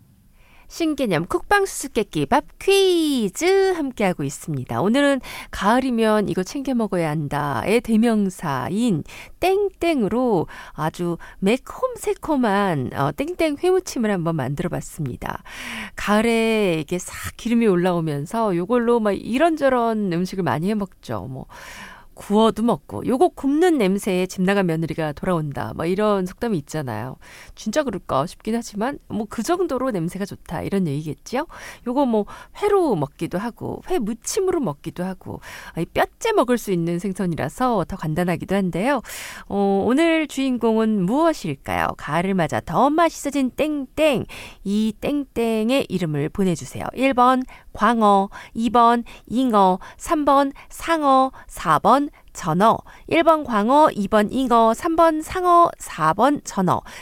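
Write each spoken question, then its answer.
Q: 오늘 주인공은 무엇일까요? 가을을 맞아 더 맛있어진 땡땡.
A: 4: 전어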